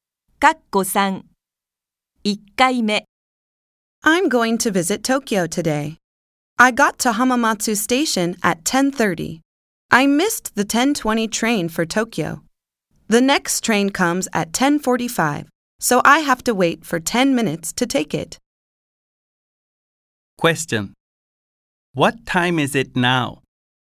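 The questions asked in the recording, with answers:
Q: What time is it now?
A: 10:35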